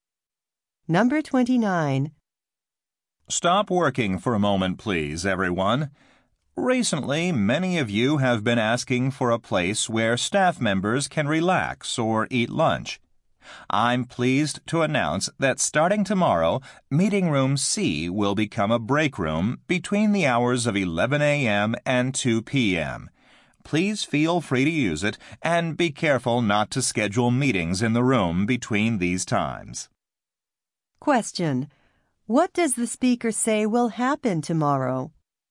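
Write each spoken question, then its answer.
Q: What does the speaker say will happen tomorrow?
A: Meeting Room C will become a break room from 11 to 2.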